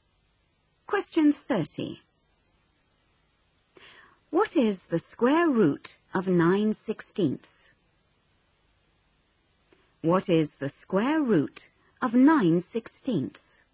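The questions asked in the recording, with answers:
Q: What is the square root of 9/16?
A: 3/4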